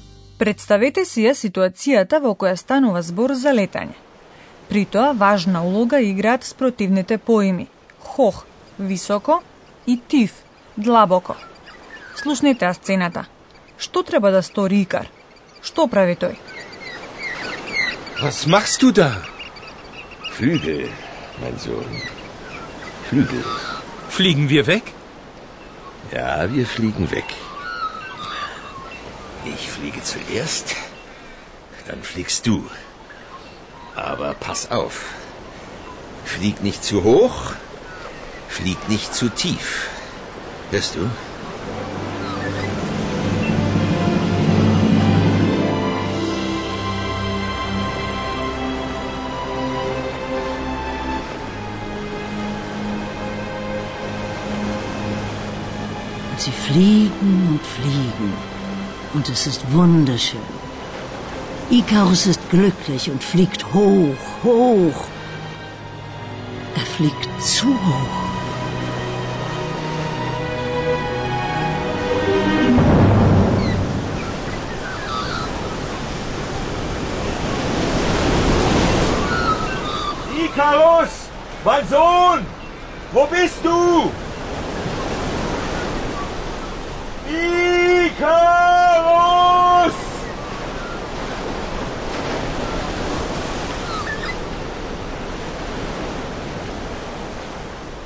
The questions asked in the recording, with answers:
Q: Што треба да стори Икар?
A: Икар треба да внимава.